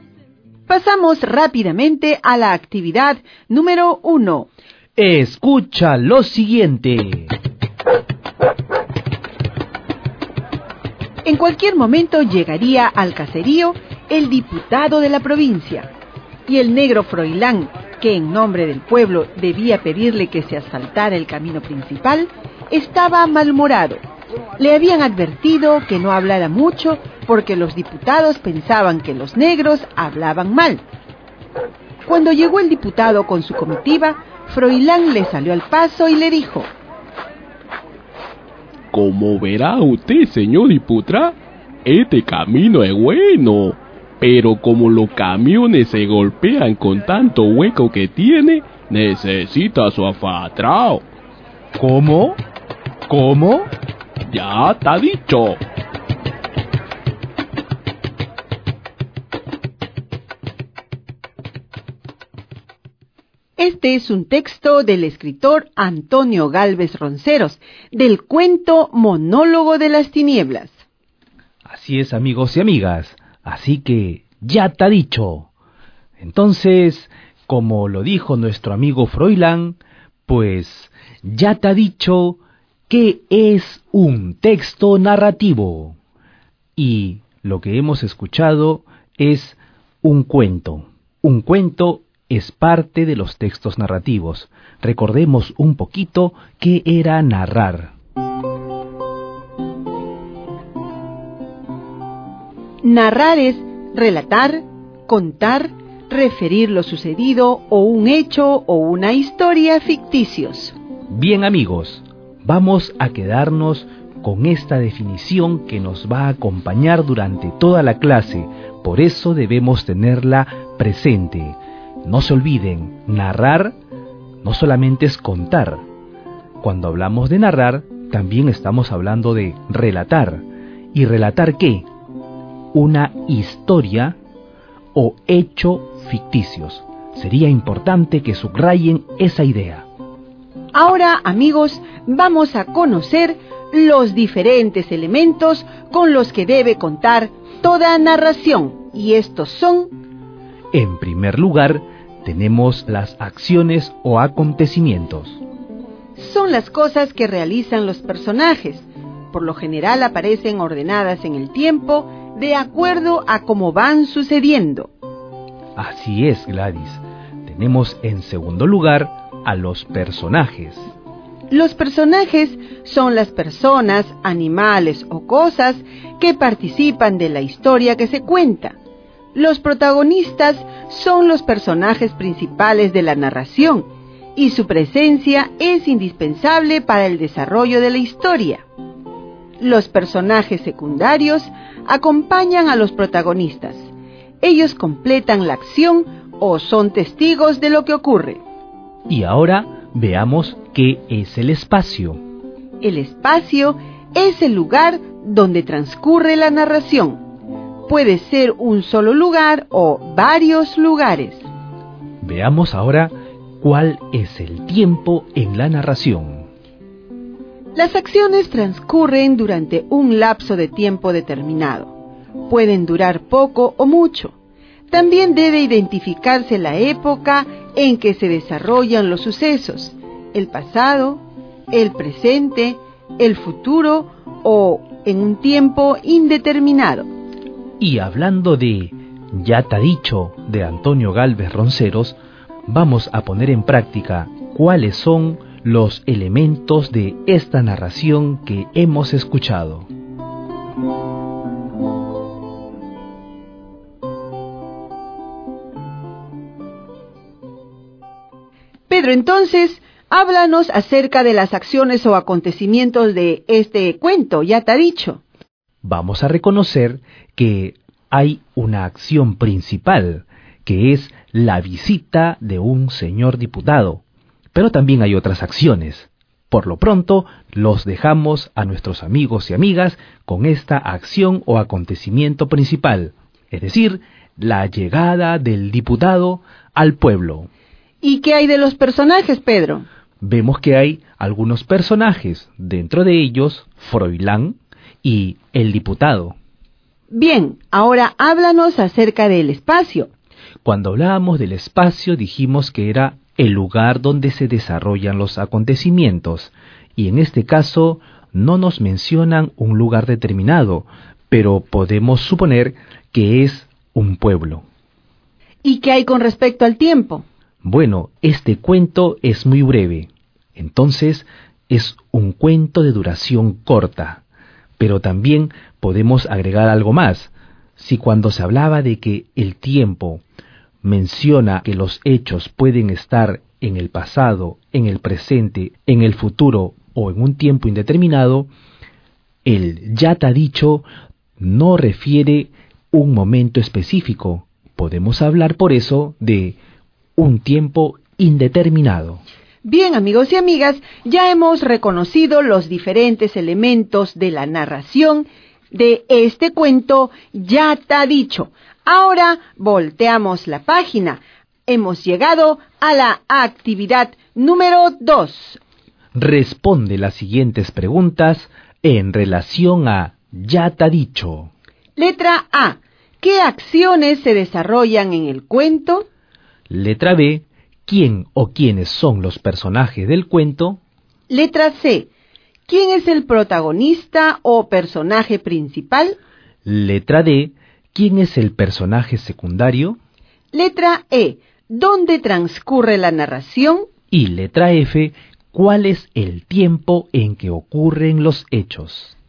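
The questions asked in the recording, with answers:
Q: ¿Qué acciones se desarrollan en el cuento?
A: La llegada del diputado al caserío y Froilán le pide que asfalte el camino

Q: ¿Quién o quiénes son los personajes del cuento?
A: Froilán y el diputado

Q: ¿Dónde transcurre la narración?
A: En un pueblo (caserío)

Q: ¿Cuál es el tiempo en que ocurren los hechos?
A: Un tiempo indeterminado, de corta duración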